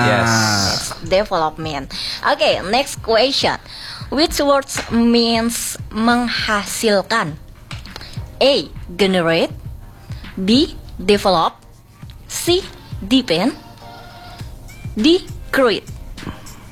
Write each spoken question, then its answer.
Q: Which words means menghasilkan?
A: So the answer is A.